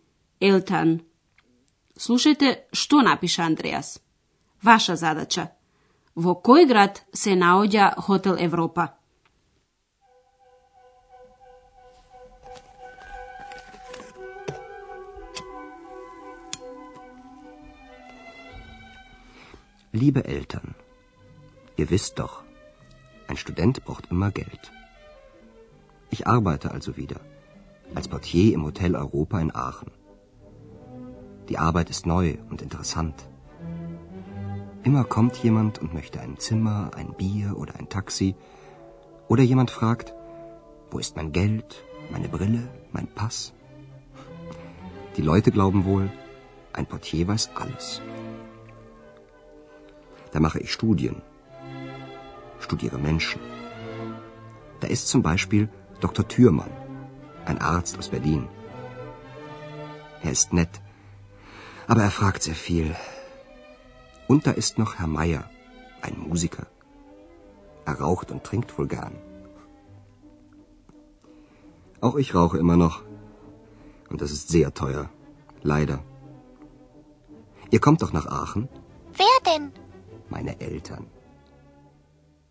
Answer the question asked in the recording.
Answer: Хотелот Европа се наоѓа во Ахен.